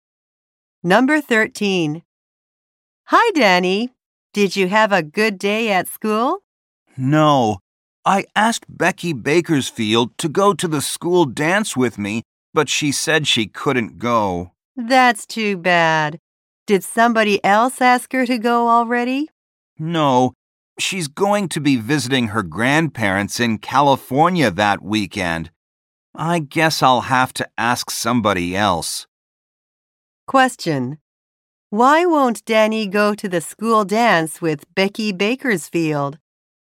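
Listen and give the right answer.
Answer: She will be visiting her grandparents in California.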